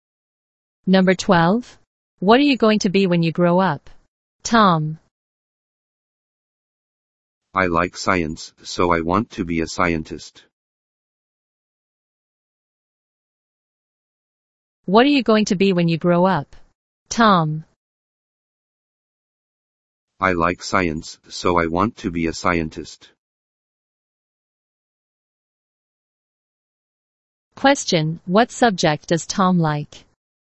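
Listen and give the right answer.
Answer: Science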